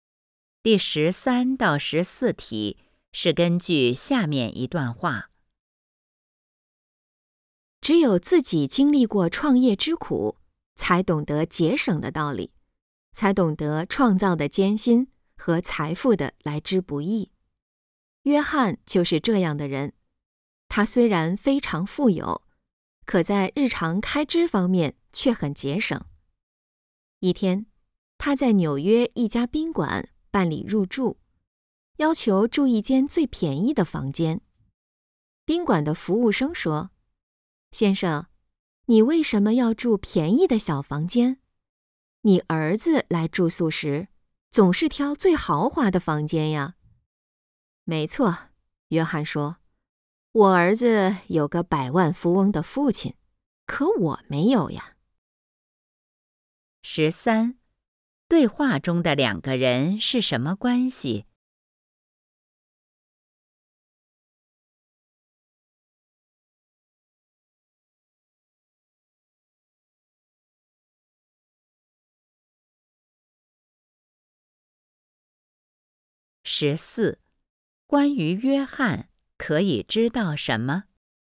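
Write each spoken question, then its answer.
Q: 对话中的两个人是什么关系?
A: 顾客和宾馆服务生

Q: 关于约翰可以知道什么?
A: 他很富有但很节省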